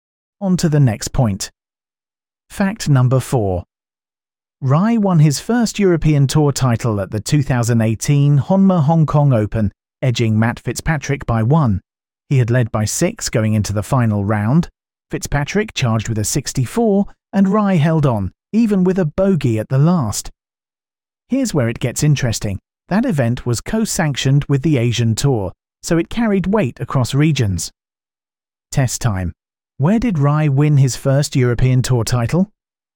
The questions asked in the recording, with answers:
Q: Where did Rye win his first European Tour title?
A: Honma Hong Kong Open.